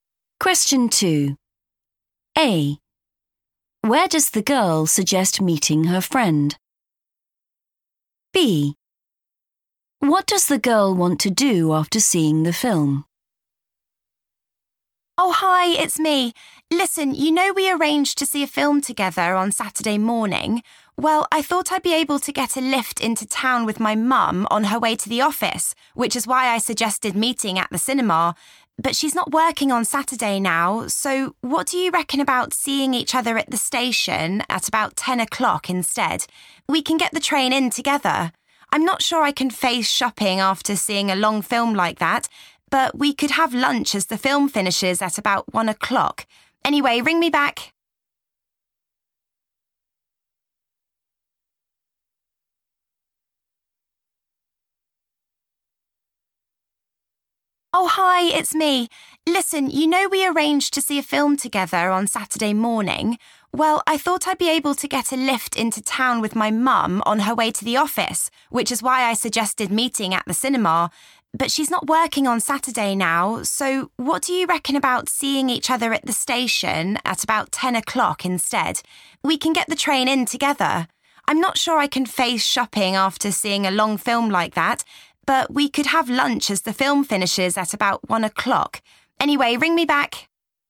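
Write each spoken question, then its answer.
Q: Where does the girl suggest meeting her friend?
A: at the station

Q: What does the girl want to do after seeing the film?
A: have lunch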